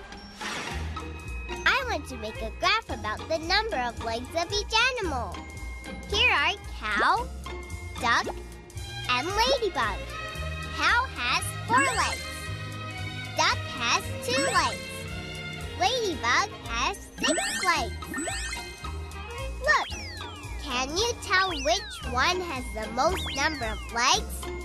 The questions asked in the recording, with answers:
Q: Look, can you tell which one has the most number of legs?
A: Yes, that's right, it's Ladybug.